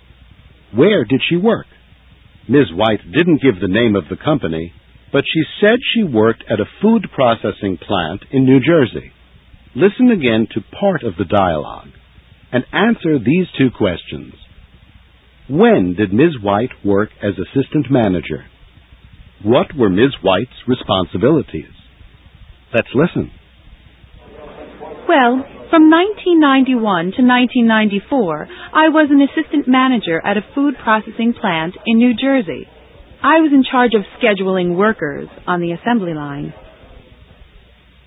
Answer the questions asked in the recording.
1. She was assistant manager from 1991 to 1994.
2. She was in charge of scheduling workers.